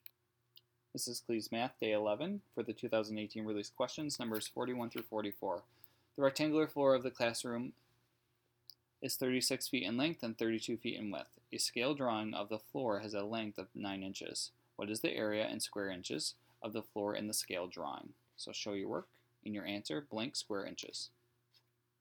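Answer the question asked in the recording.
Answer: 72 square inches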